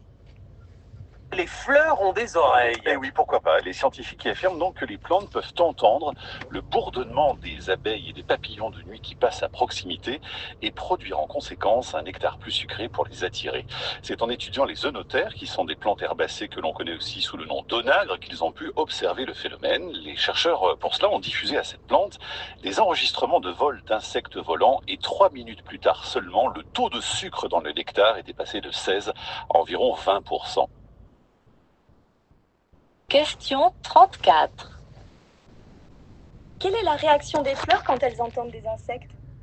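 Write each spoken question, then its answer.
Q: Quelle est la réaction des fleurs quand elles entendent des insectes?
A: Elles produisent un nectar plus sucré pour les attirer.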